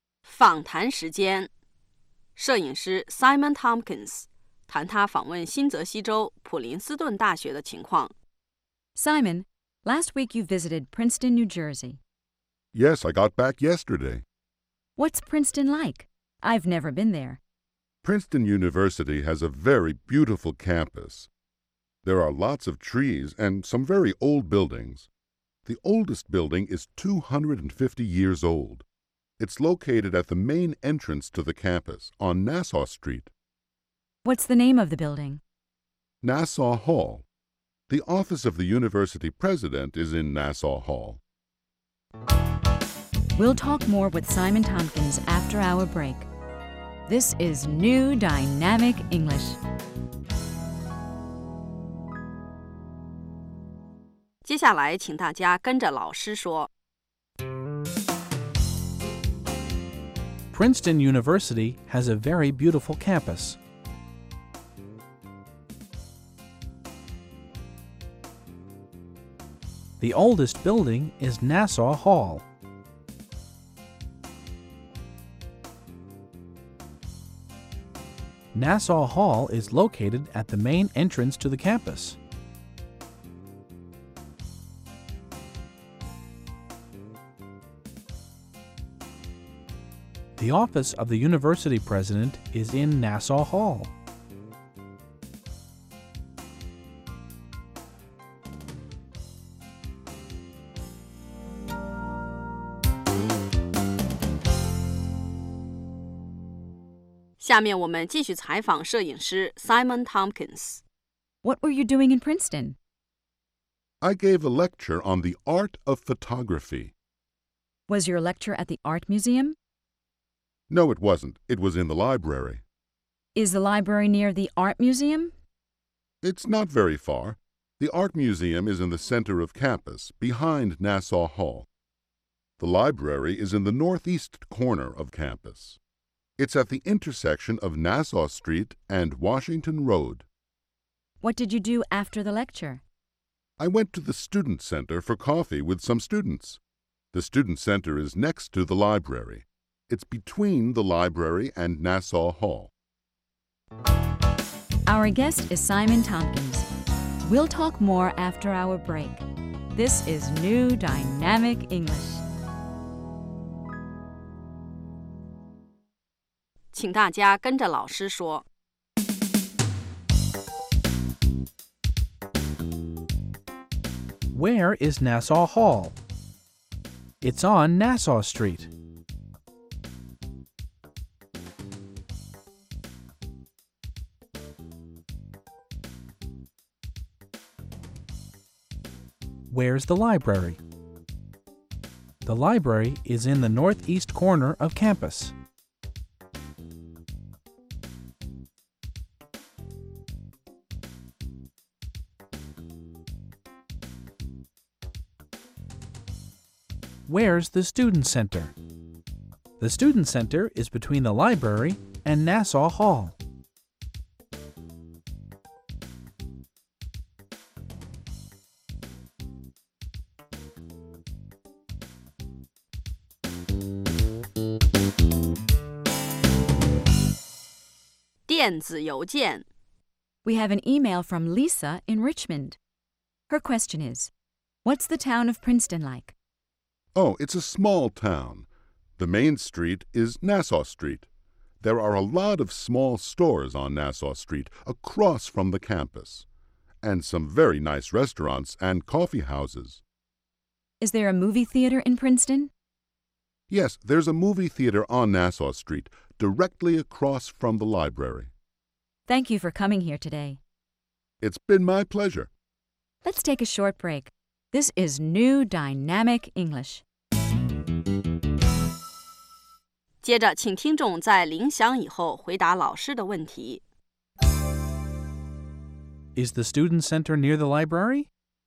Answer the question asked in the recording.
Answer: Yes, it is. It's next to the library.